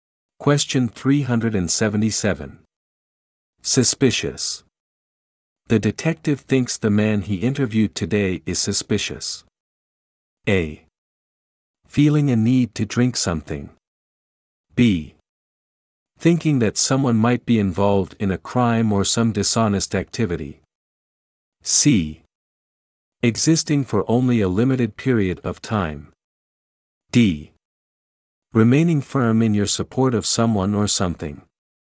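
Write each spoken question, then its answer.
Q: Suspicious.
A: B: Thinking that someone might be involved in a crime or some dishonest activity.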